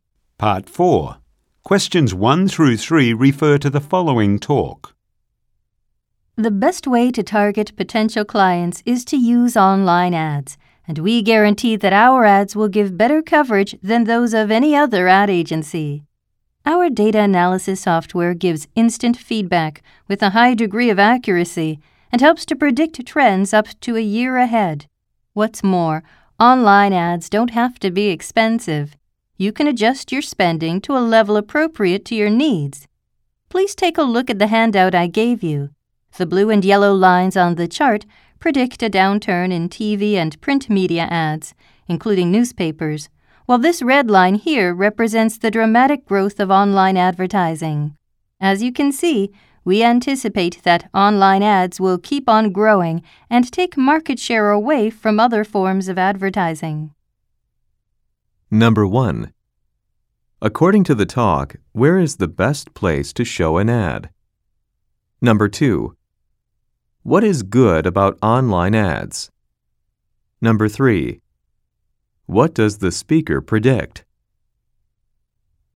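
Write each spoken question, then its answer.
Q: According to the talk, where is the best place to show an ad?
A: Online

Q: What does the speaker predict?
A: Online ads will keep growing and take market share from TV and print ads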